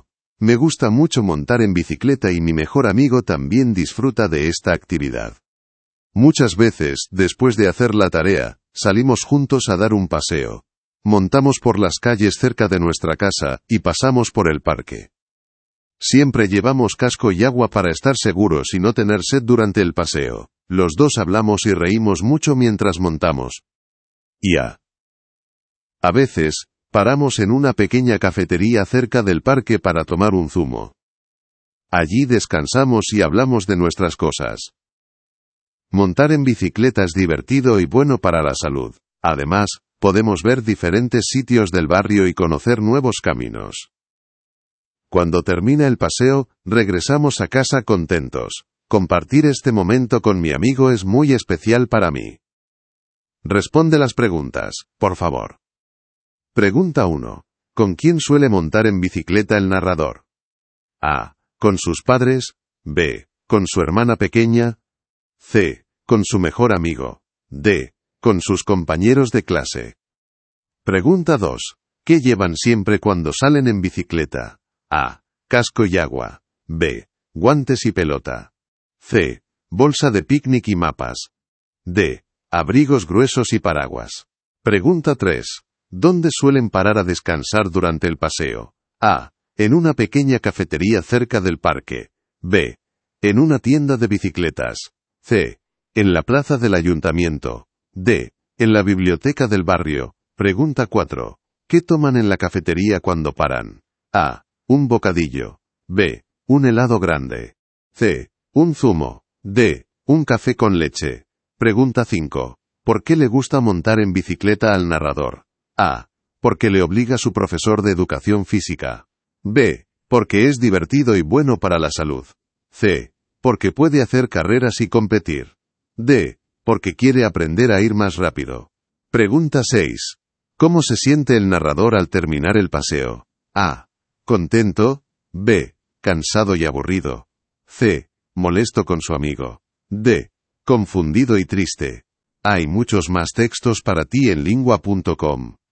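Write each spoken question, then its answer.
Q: ¿Con quién suele montar en bicicleta el narrador?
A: C: Con su mejor amigo.

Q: ¿Qué llevan siempre cuando salen en bicicleta?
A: A: Casco y agua.

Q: ¿Dónde suelen parar a descansar durante el paseo?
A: A: En una pequeña cafetería cerca del parque.

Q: ¿Qué toman en la cafetería cuando paran?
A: C: Un zumo.

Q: ¿Por qué le gusta montar en bicicleta al narrador?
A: B: Porque es divertido y bueno para la salud.

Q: ¿Cómo se siente el narrador al terminar el paseo?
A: A: Contento.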